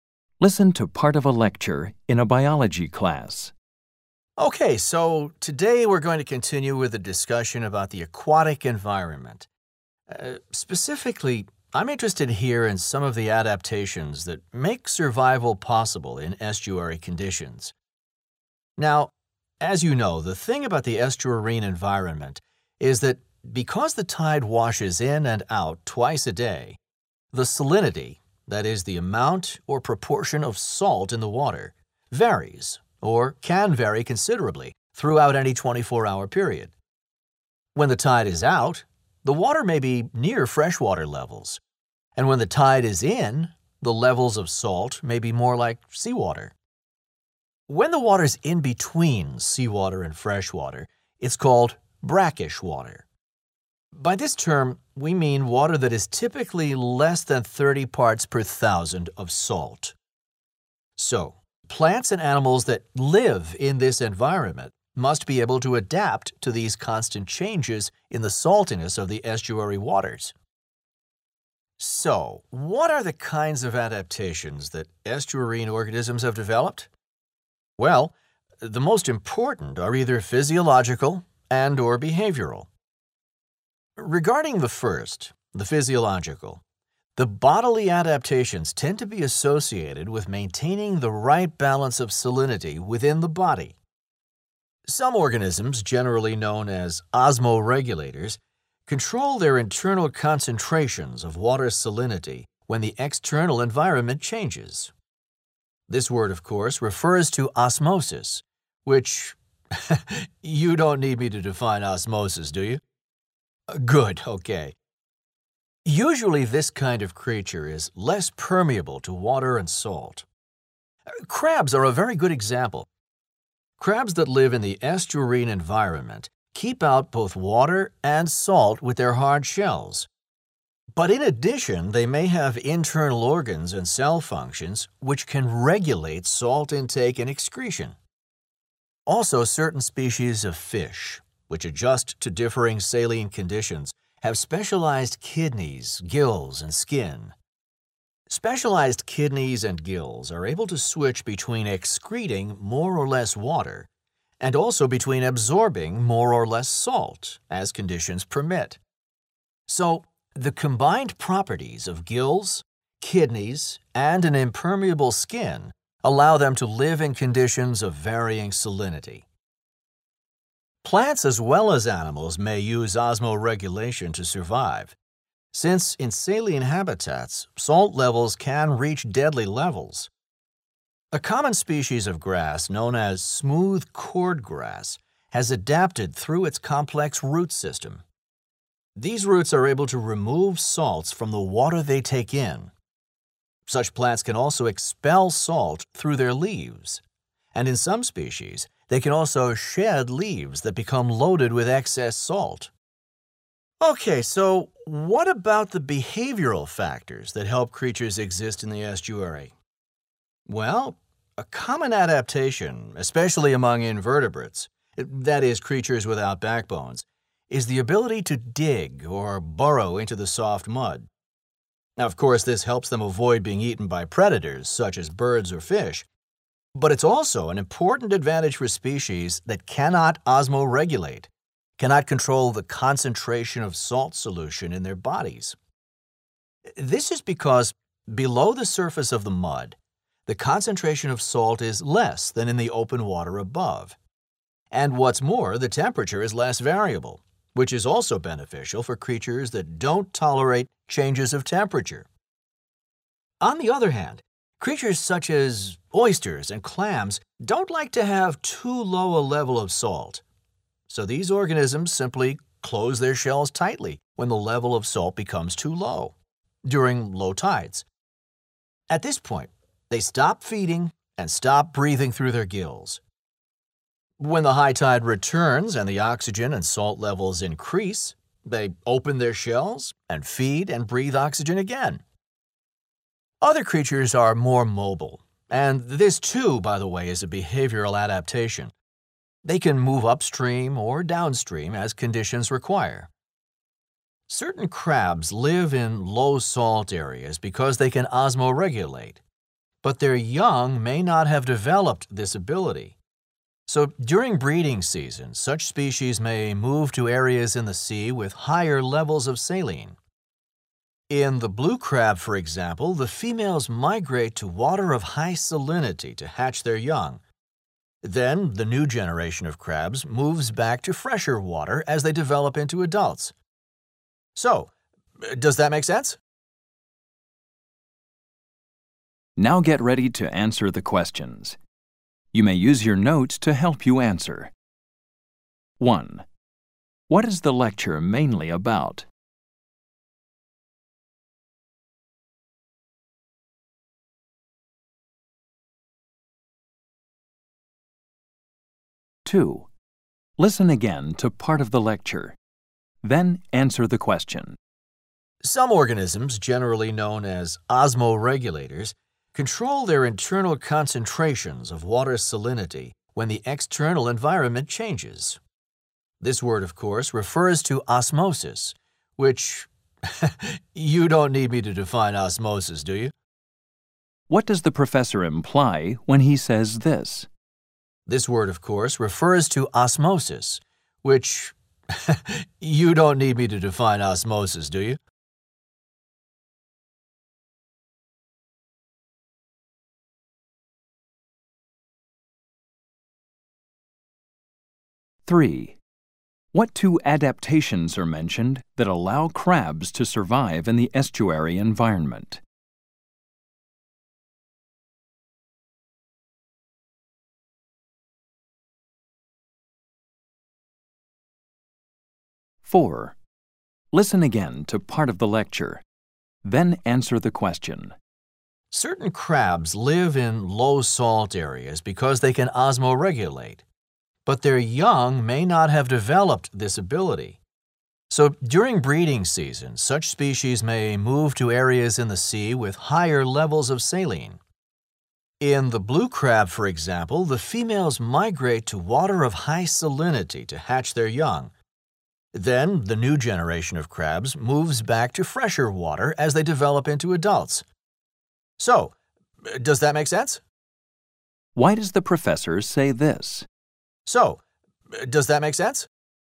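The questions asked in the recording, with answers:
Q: What is the lecture mainly about?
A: How estuarine organisms adapt to changing salinity

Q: What does the professor imply when he says this?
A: The students already know what osmosis means

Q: What two adaptations are mentioned that allow crabs to survive in the estuary environment?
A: Hard shells that keep out water and salt, and internal organs/cell functions that regulate salt intake and excretion

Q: Why does the professor say this?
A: To check whether the students understand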